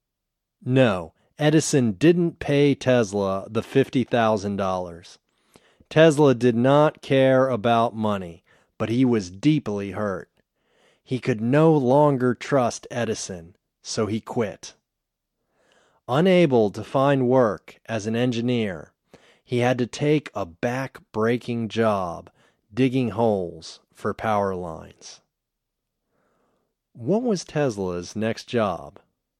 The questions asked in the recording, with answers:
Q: What was Tesla's next job?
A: His next job was digging holes for power lines.